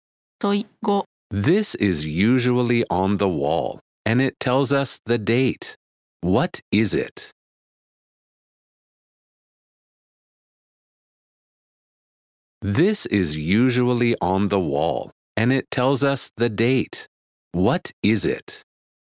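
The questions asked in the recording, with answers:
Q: What is it?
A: A calendar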